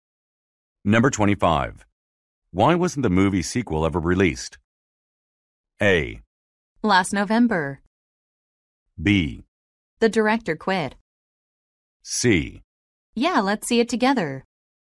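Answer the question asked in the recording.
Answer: B: The director quit.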